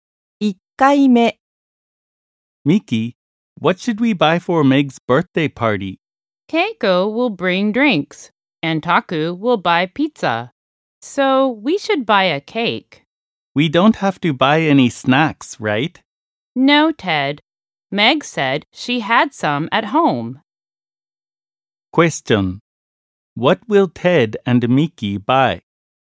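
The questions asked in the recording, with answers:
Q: What will Ted and Miki buy?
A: A cake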